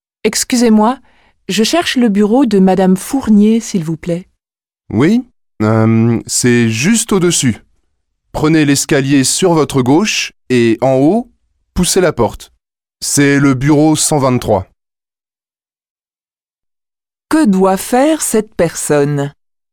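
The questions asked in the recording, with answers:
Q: Que doit faire cette personne ?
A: Prendre l'escalier à gauche, monter et pousser la porte du bureau 123.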